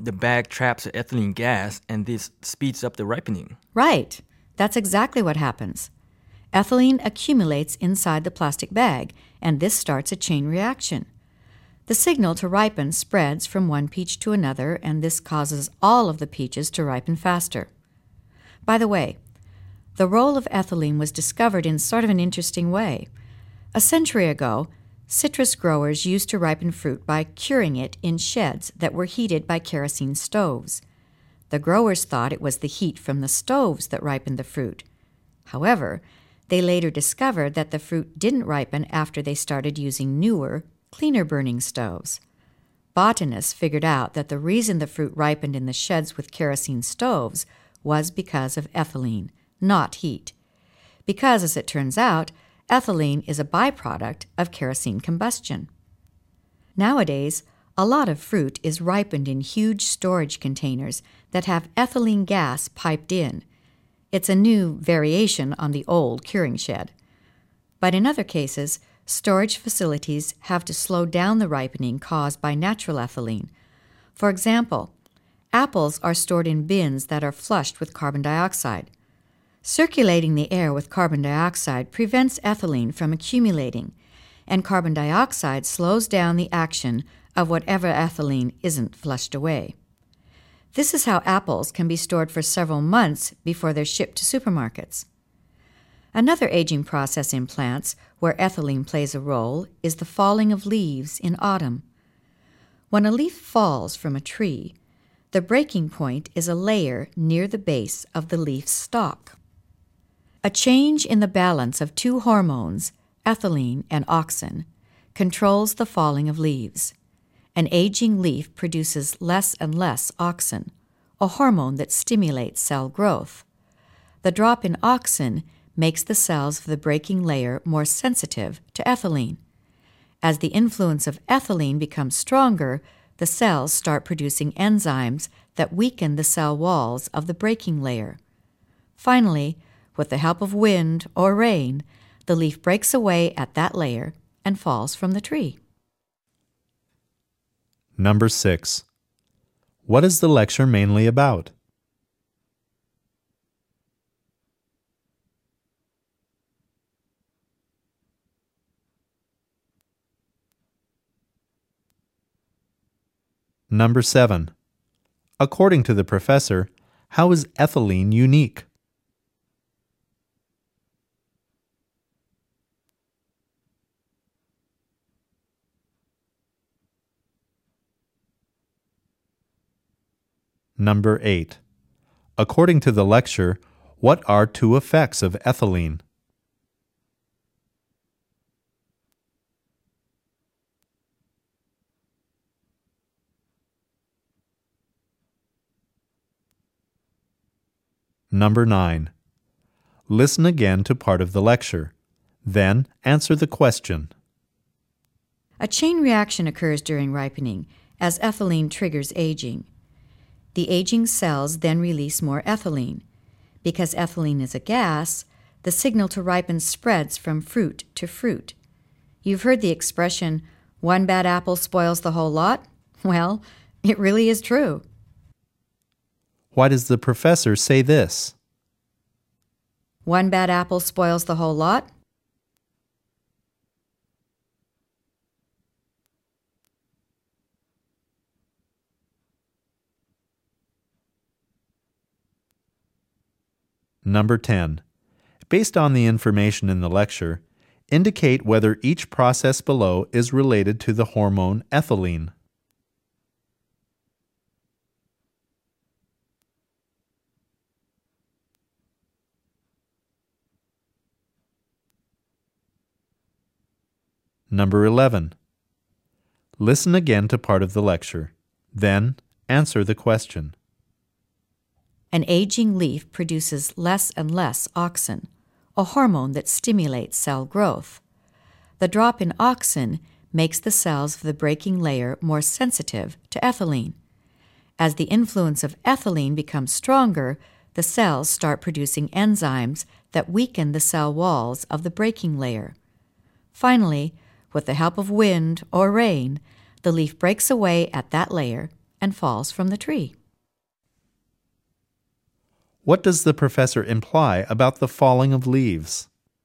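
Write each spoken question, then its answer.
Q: According to the lecture, what are two effects of ethylene?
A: It makes fruit ripen and it makes leaves fall

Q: Why does the professor say this?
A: To show that ethylene from one ripening fruit makes the fruit around it ripen too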